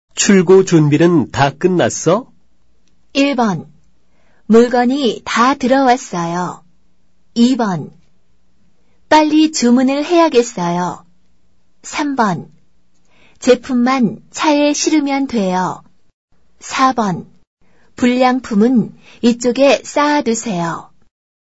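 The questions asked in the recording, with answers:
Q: 출고 준비는 다 끝났어?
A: 3: 제품만 차에 실으면 돼요.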